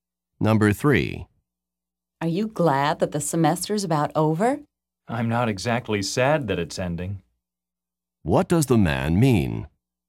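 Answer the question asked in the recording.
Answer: He is glad the semester is ending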